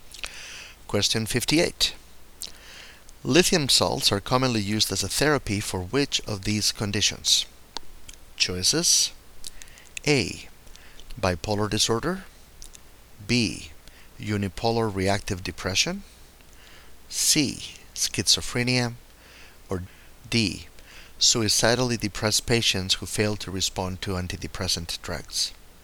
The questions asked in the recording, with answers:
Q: Lithium salts are commonly used as a therapy for which of these conditions?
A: And the correct choice is A.